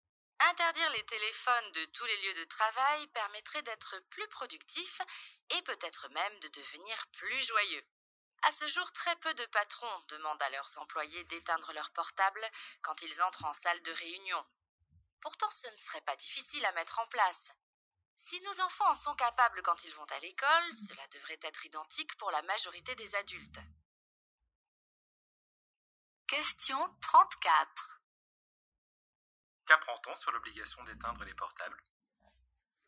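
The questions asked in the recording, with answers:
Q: Qu'apprend-on sur l'obligation d'éteindre les portables ?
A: Très peu de patrons l'imposent à leurs employés en réunion.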